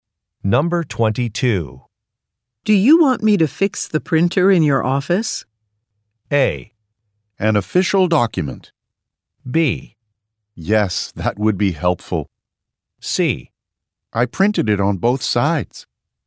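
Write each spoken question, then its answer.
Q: Do you want me to fix the printer in your office?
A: B: Yes, that would be helpful.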